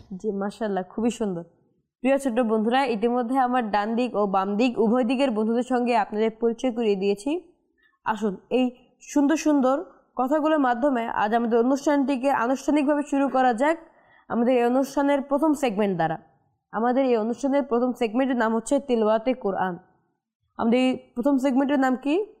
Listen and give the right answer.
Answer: জি, অর্থাৎ কোরআন পাকের তেলাওয়াত।